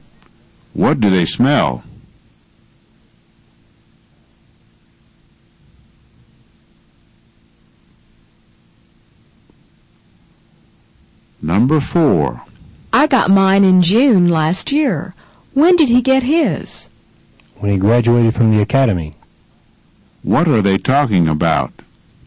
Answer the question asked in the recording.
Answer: They're talking about his commission.